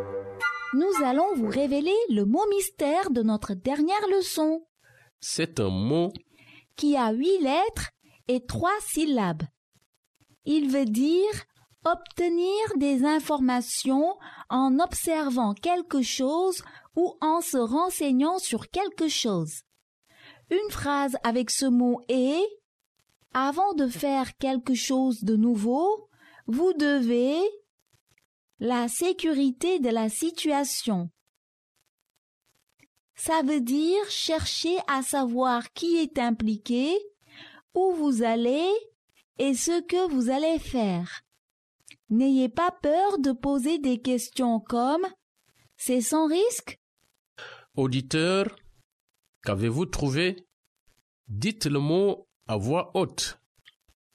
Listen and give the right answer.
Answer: Le mot mystère d'aujourd'hui est... Vérifier.